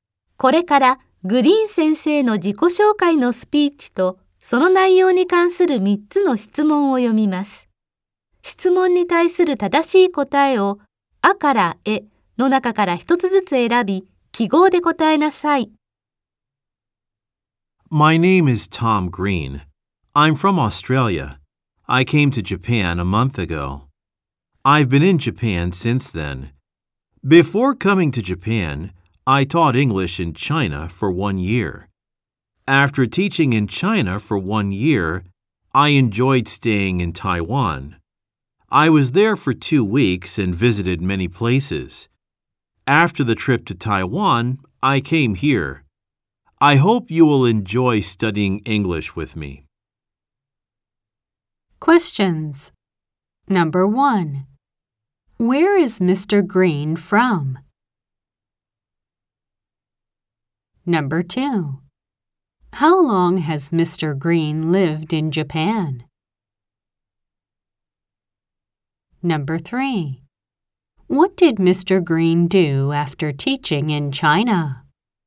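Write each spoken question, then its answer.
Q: Where is Mr. Green from?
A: Australia

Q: How long has Mr. Green lived in Japan?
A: For a month

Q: What did Mr. Green do after teaching in China?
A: He stayed in Taiwan for 2 weeks and visited many places.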